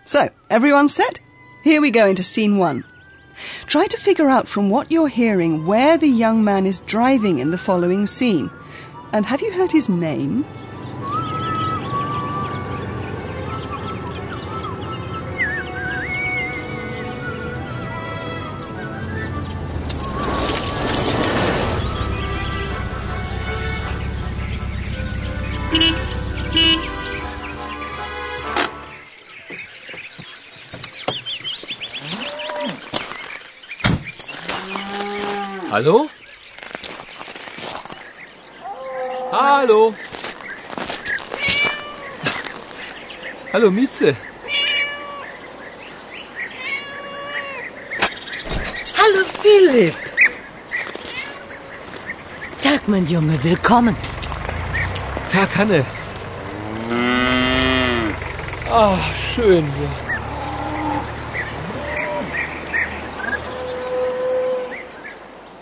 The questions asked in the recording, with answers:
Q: And have you heard his name?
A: Maybe you've also gathered that the young man is called Philip